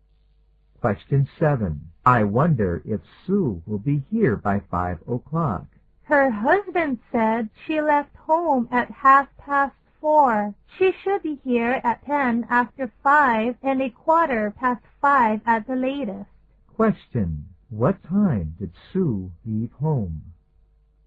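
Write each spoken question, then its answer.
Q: What time did Sue leave home?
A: At 4:30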